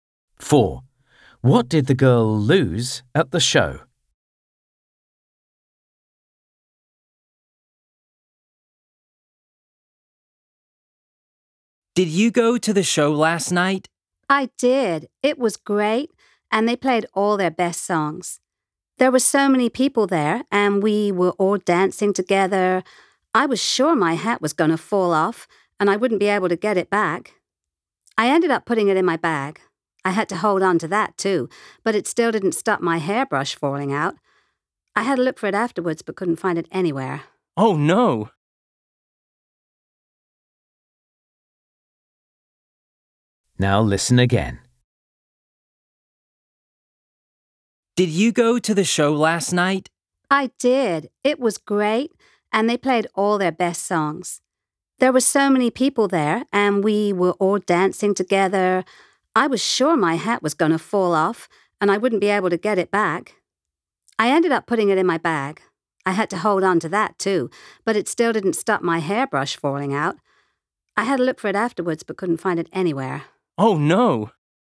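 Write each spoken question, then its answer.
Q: What did the girl lose at the show?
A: her hairbrush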